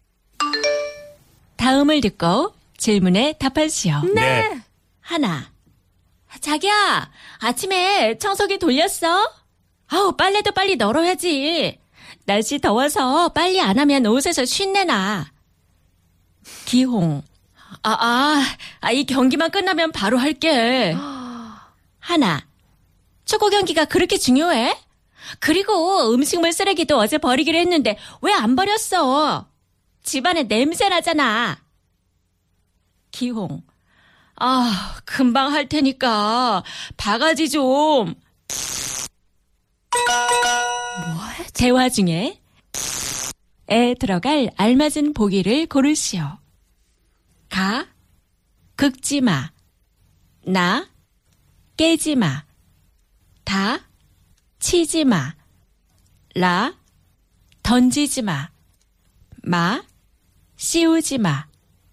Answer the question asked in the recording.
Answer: 가 긁지 마. Stop scratching the dipper or the bowl, which I guess roughly translates to stop nagging.